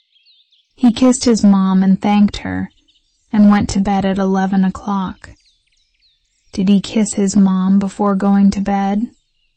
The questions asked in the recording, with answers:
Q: Did he kiss his mom before going to bed?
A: Yes, he did.